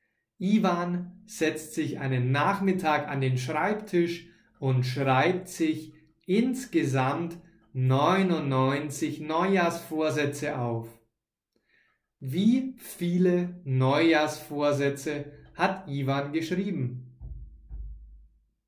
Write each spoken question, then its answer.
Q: Wie viele Neujahrsvorsätze hat Ivan geschrieben?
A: 99 Ivan hat 99 Neujahrsvorsätze geschrieben.